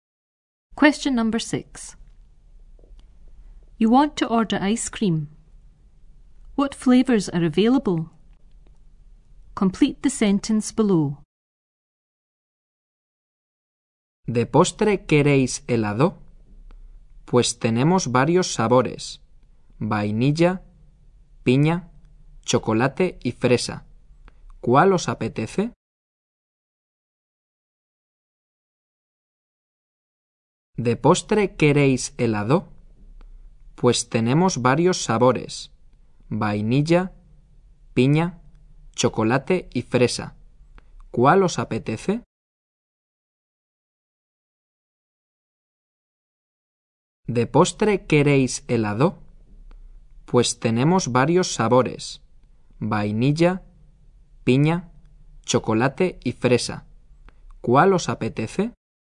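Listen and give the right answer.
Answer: Vanilla, pineapple, chocolate and strawberry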